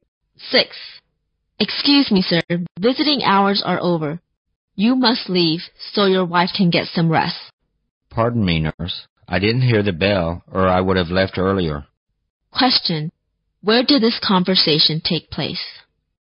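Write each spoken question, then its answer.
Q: where did this conversation take place?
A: In a hospital.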